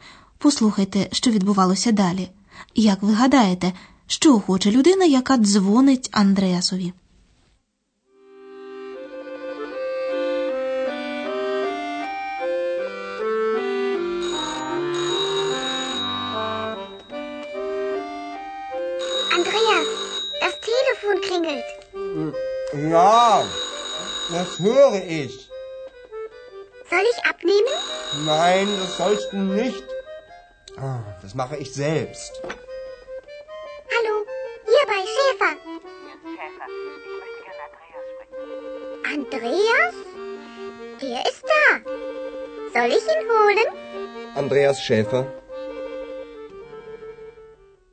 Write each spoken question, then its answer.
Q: Як ви гадаєте, що хоче людина, яка дзвонить Андреасові?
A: Жінка, яка телефонувала, хотіла поговорити з Андреасом.